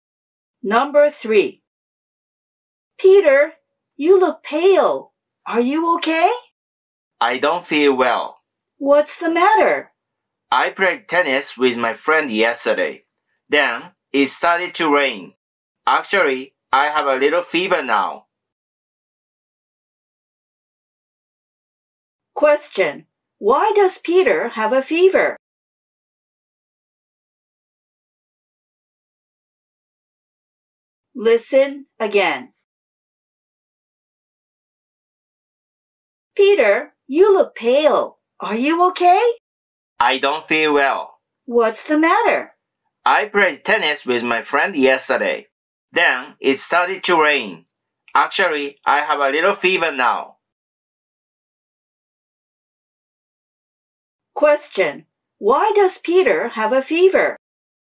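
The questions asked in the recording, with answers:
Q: Why does Peter have a fever?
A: He played tennis yesterday and it started to rain.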